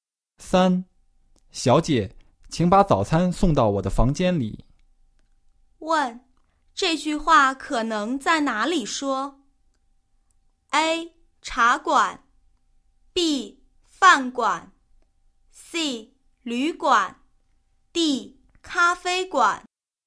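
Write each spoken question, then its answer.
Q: 问,这句话可能在哪里说?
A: C: 旅馆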